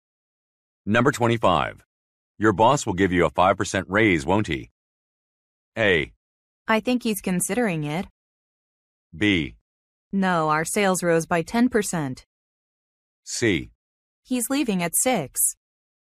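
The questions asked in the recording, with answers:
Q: Your boss will give you a 5% raise, won't he?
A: A: I think he's considering it.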